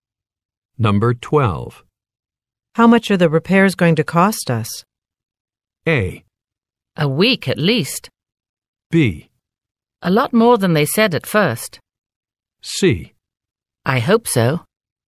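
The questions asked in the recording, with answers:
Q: How much are the repairs going to cost us?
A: B: A lot more than they said at first.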